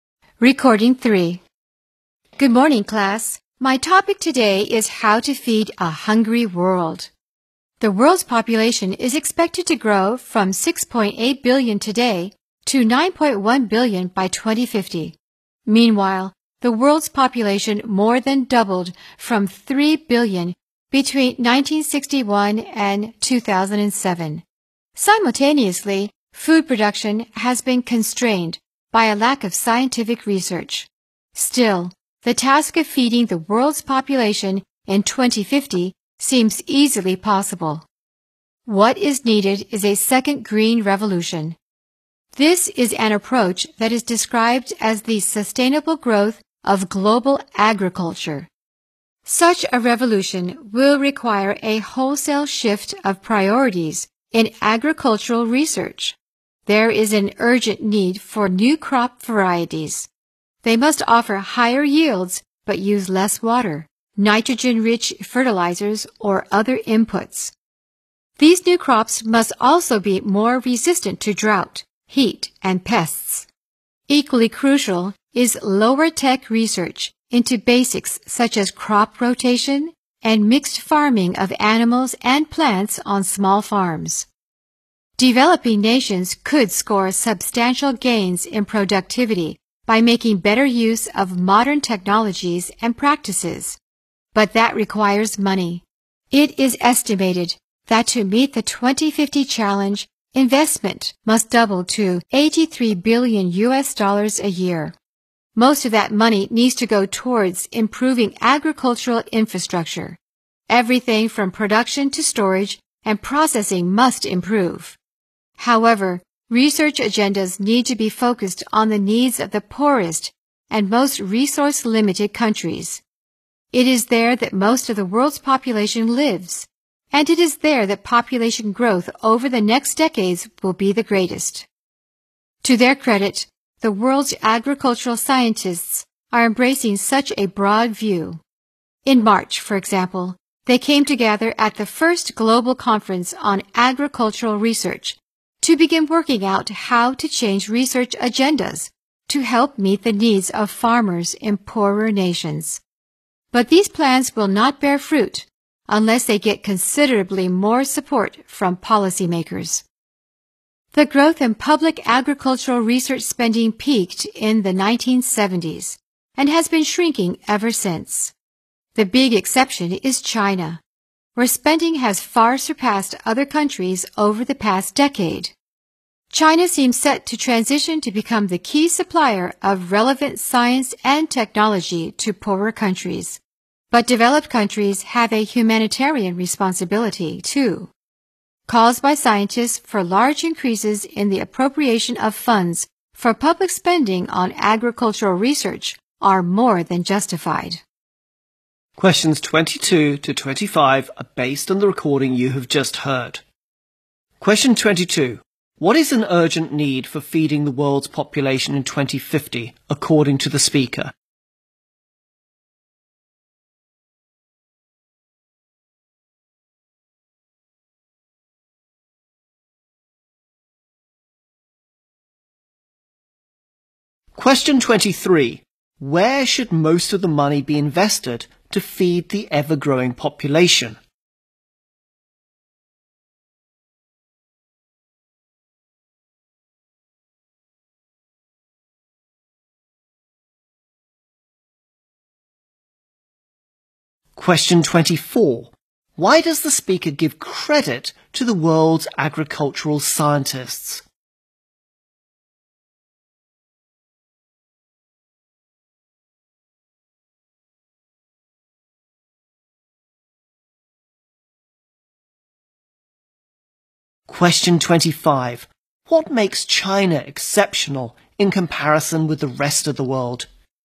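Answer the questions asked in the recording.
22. New crop varieties
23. Agricultural infrastructure
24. They are taking a broad view and shifting research to help farmers in poorer nations
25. Its spending on agricultural research has far surpassed other countries' over the past decade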